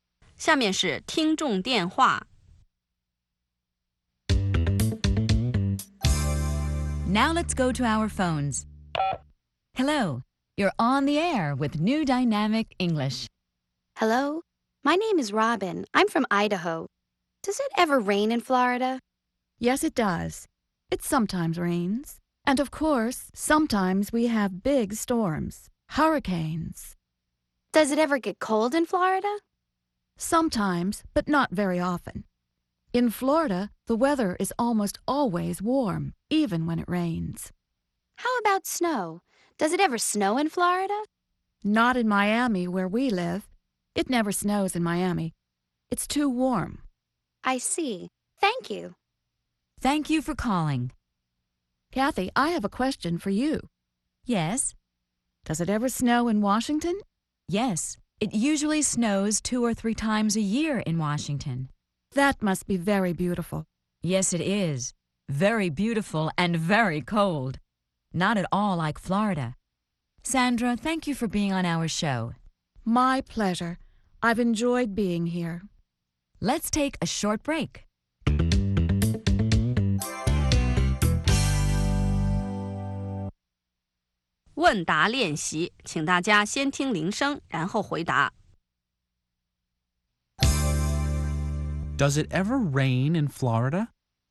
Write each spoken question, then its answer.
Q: Does it ever rain in Florida?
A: Yes, it does. It sometimes rains.